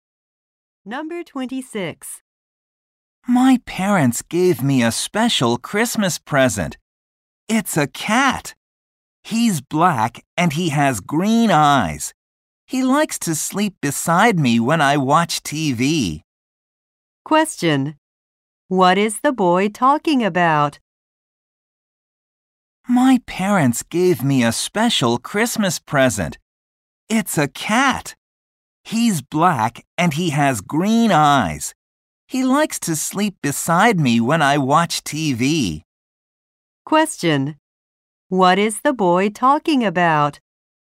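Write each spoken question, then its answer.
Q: What is the boy talking about?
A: His cat (a Christmas present)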